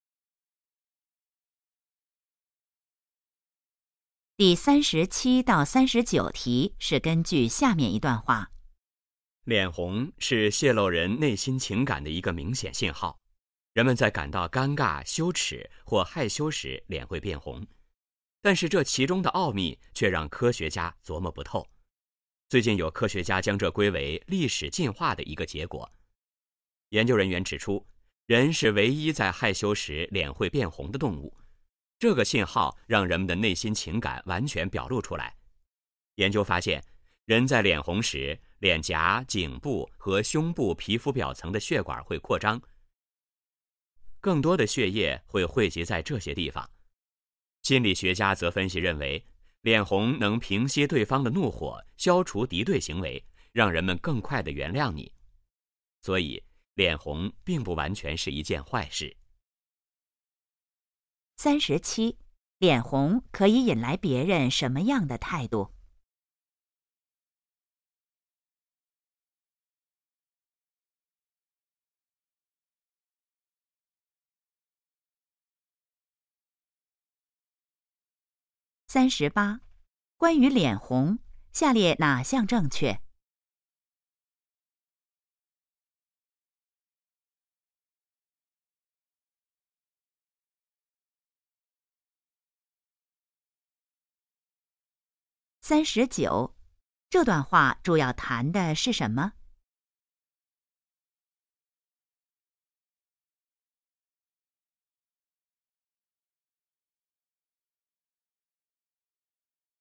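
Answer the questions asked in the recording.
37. 更快地原谅你
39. 脸红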